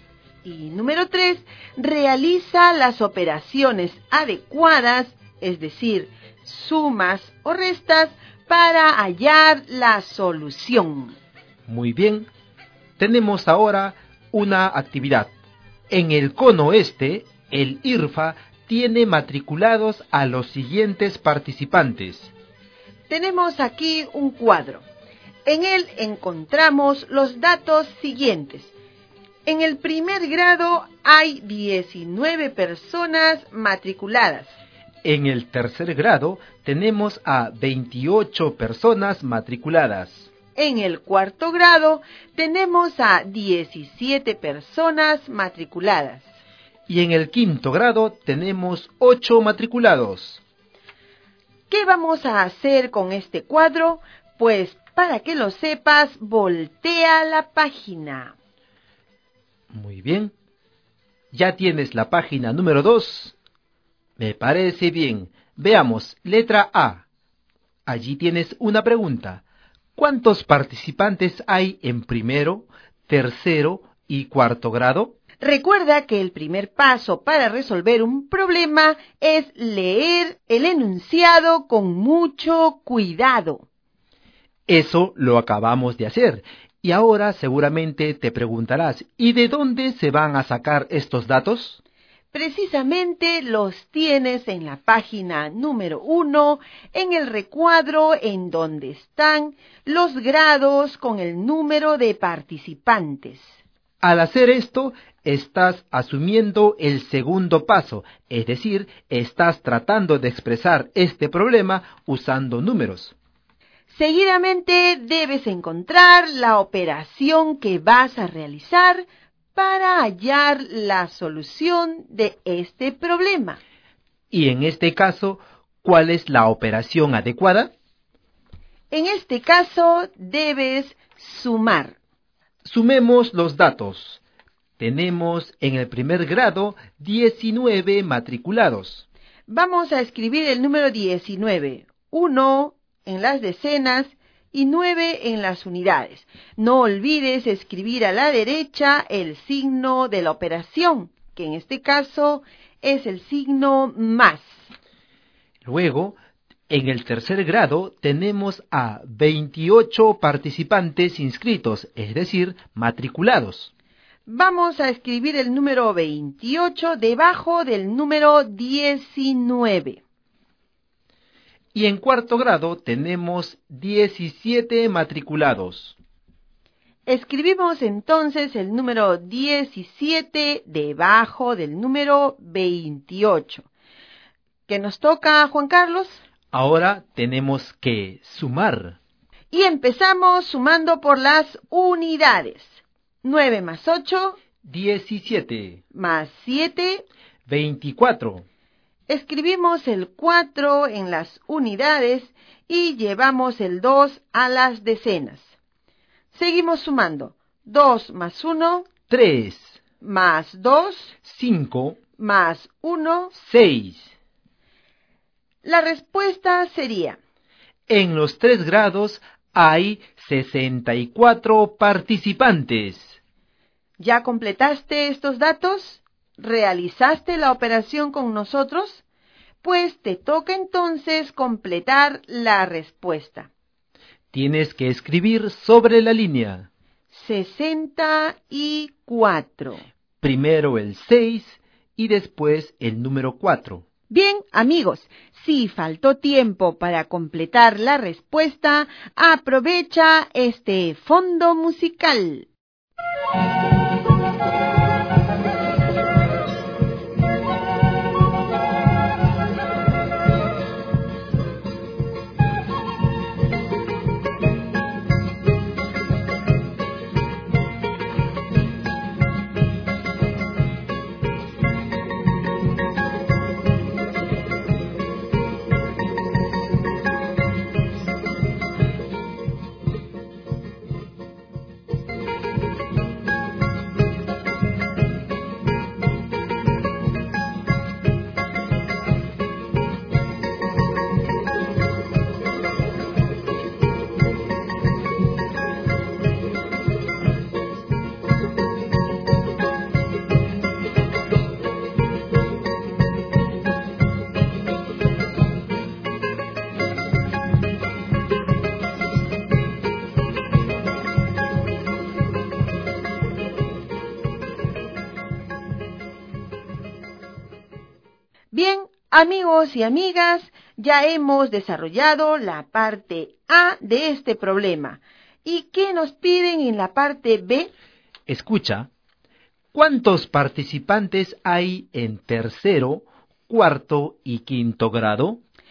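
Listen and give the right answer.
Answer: 53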